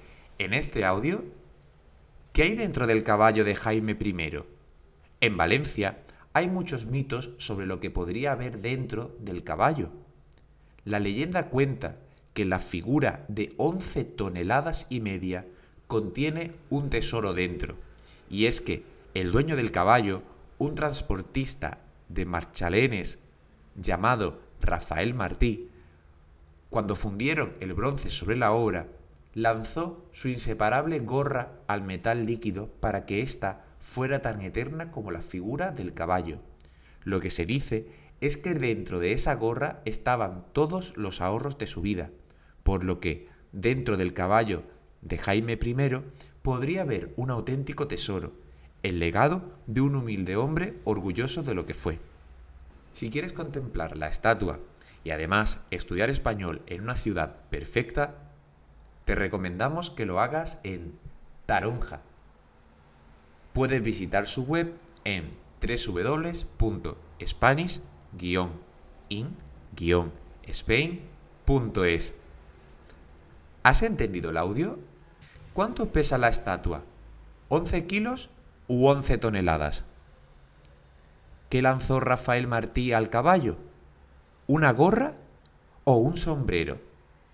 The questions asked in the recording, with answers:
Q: ¿Cuánto pesa la estatua?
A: pesa once toneladas

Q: ¿Qué lanzó Rafael Martí al caballo?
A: tiró una gorra